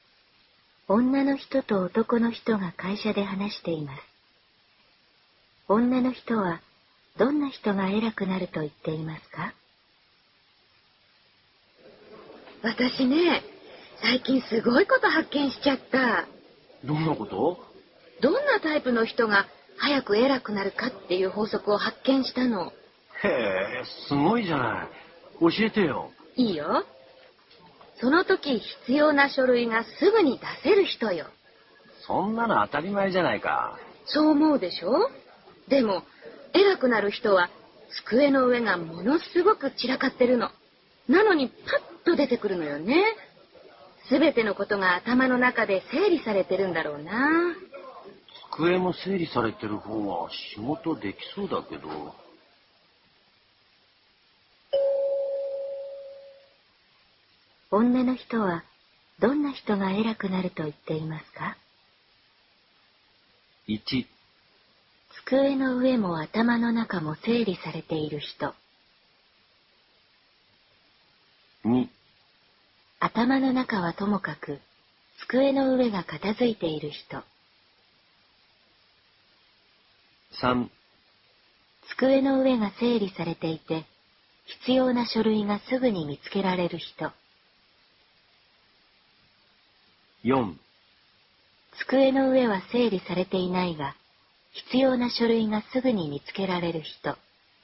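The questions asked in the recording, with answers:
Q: 女の人はどんな人が偉くなると言っていますか?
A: 4: 机の上は整理されていないが必要な書類がすぐに見つけられる人。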